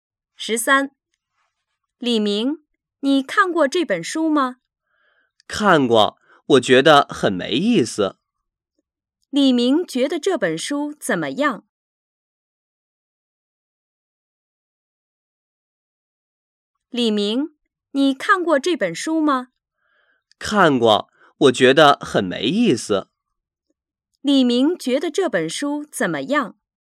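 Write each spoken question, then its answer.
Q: 李明觉得这本书怎么样?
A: 很没意思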